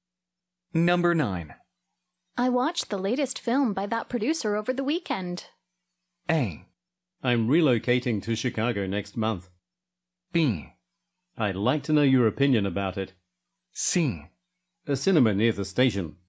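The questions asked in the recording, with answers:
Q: I watched the latest film by that producer over the weekend.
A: B: I'd like to know your opinion about it.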